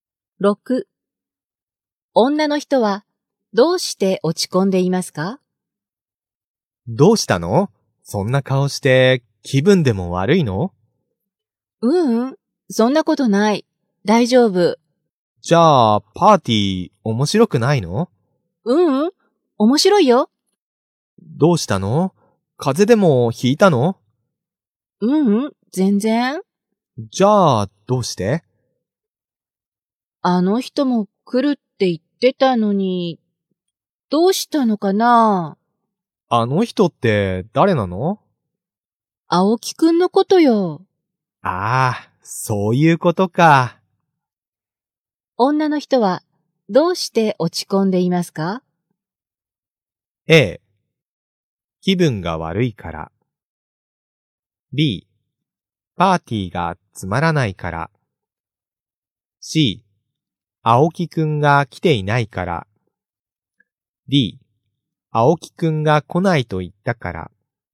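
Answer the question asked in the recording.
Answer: C: 青木くんが来ていないから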